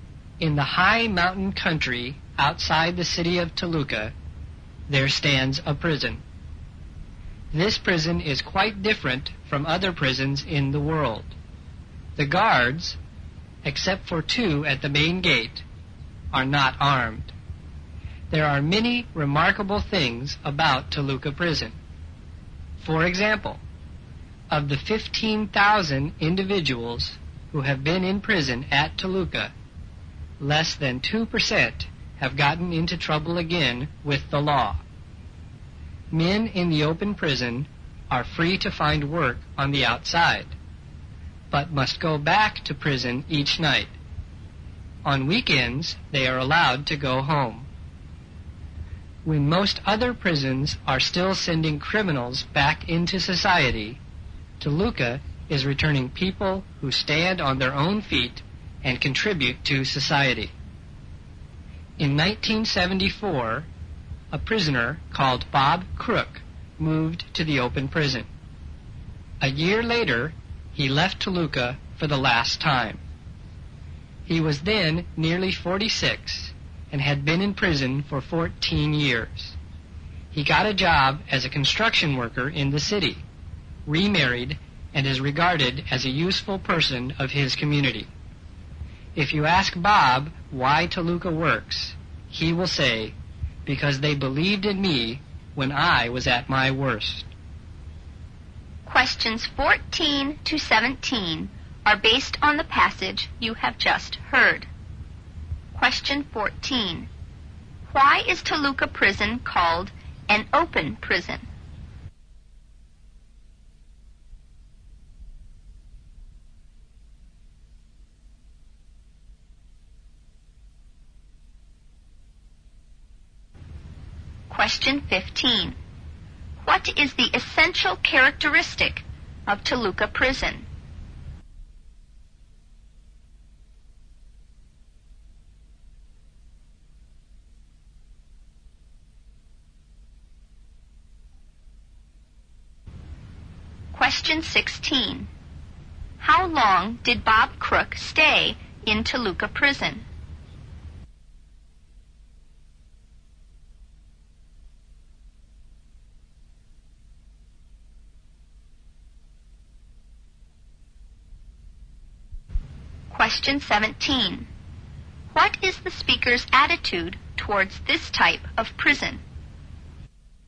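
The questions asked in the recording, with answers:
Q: Why is Toluca Prison called an open prison?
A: Prisoners can work outside during the day and go home on weekends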